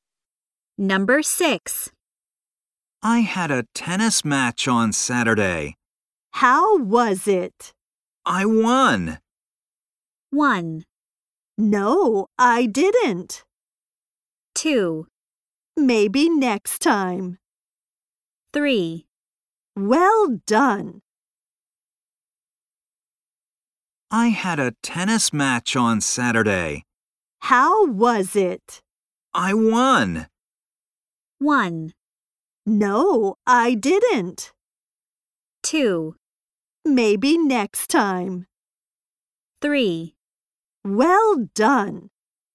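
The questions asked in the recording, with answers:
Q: I won.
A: 3: Well done.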